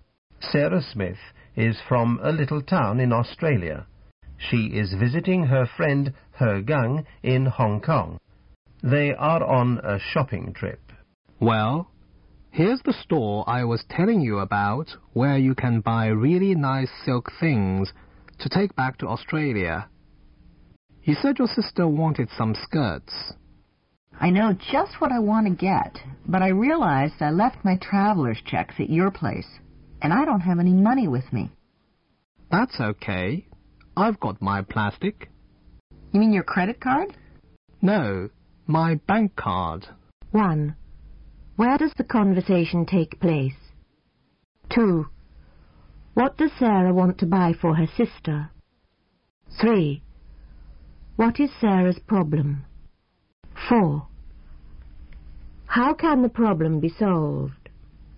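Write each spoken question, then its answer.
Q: Where does the conversation take place?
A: In a store in Hong Kong that sells silk things

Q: What does Sarah want to buy for her sister?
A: Some silk skirts

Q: What is Sarah's problem?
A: She left her traveler's checks at her friend's place and has no money with her

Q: How can the problem be solved?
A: He Gang pays with his bank card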